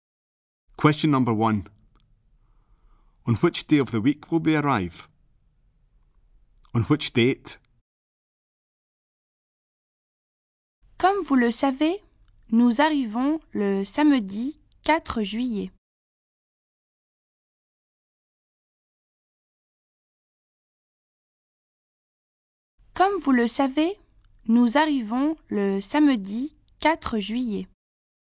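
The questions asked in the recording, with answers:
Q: On which day of the week will they arrive?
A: Saturday

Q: On which date?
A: 4th July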